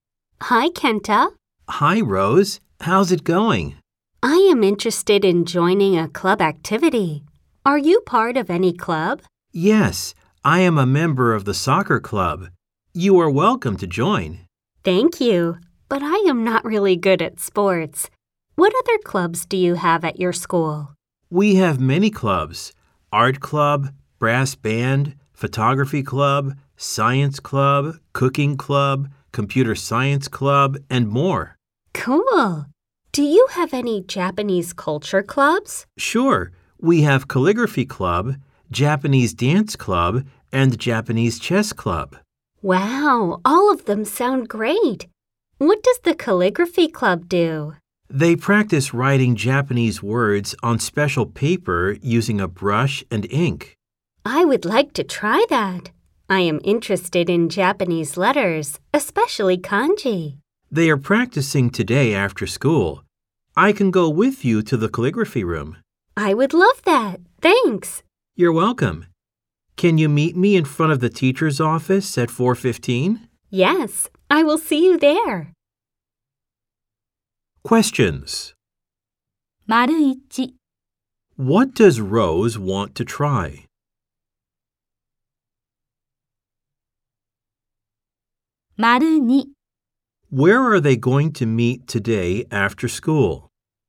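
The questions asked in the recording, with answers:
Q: What does Rose want to try?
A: Calligraphy (writing Japanese words with a brush and ink)

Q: Where are they going to meet today after school?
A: In front of the teacher's office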